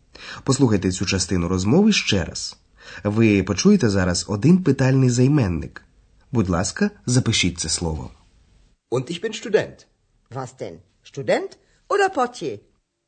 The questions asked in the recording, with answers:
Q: Ви почуєте зараз один питальний займенник.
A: Це займенник вас.